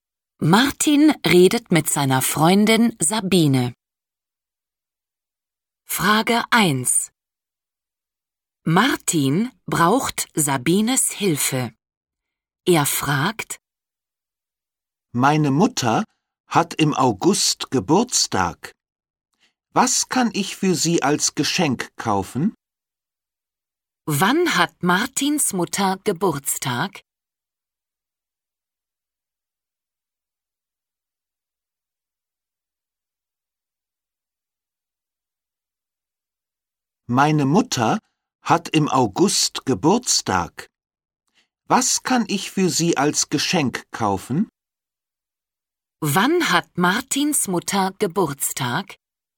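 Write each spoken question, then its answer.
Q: Wann hat Martins Mutter Geburtstag?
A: im August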